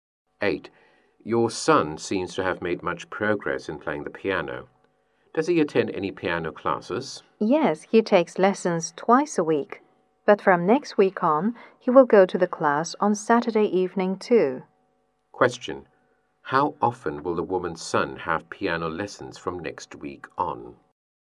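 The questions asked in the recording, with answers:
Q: How often will the woman's son have piano lessons from next week on?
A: Three times a week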